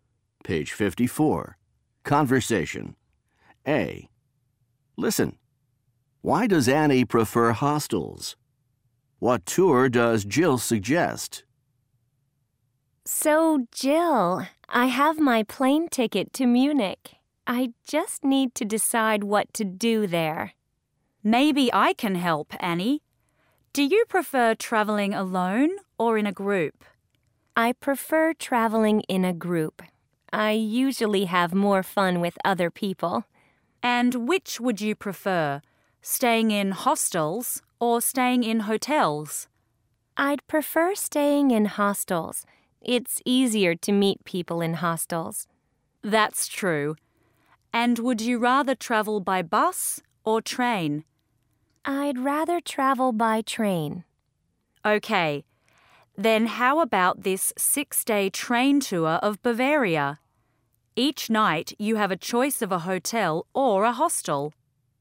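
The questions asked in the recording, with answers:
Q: Why does Annie prefer hostels?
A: It's easier to meet people in hostels.

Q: What tour does Jill suggest?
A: A 6-day train tour of Bavaria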